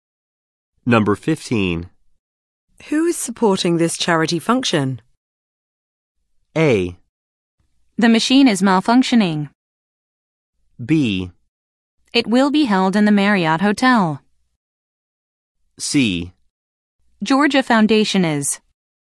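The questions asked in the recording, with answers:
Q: Who is supporting this charity function?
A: C: Georgia Foundation is.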